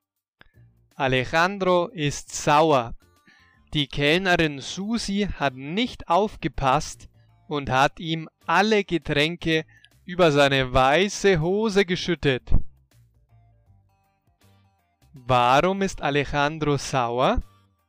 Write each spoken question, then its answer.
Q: Warum ist Alejandro sauer?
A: Er ist sauer, weil die Kellnerin Susi ihm alle Getränke über seine weiße Hose geschüttet hat.